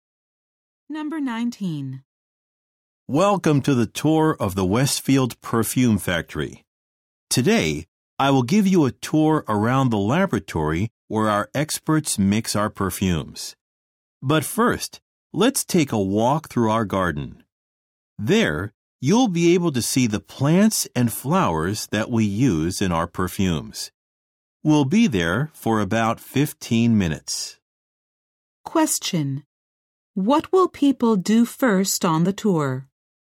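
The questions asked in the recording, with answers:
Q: What will people do first on the tour?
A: Walk through the garden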